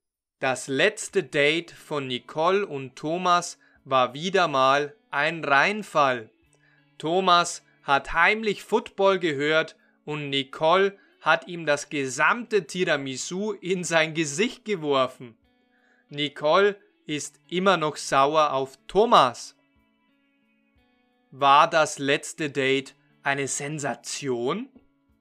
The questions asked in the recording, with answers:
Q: War das letzte Date eine Sensation?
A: Nein, das letzte Date war keine Sensation, sondern ein Reinfall.